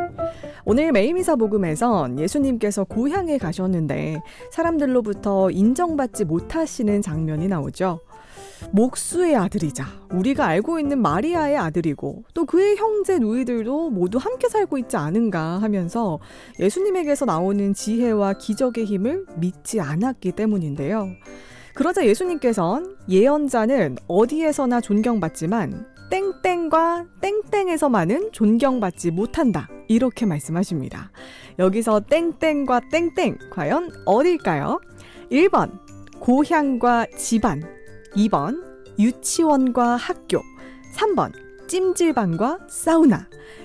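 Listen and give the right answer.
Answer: 1번: 고향과 집안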